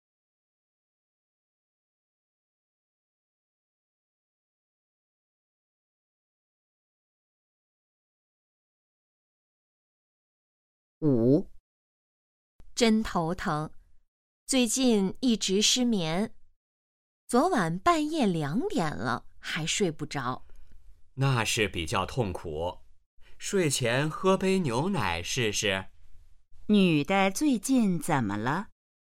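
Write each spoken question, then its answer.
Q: 女的最近怎么了?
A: 失眠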